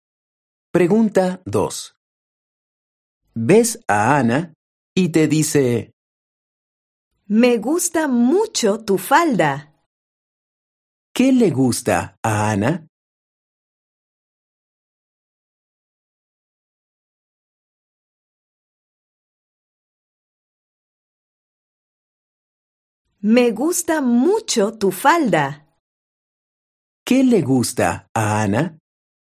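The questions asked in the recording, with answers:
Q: ¿Qué le gusta a Ana?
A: Tu falda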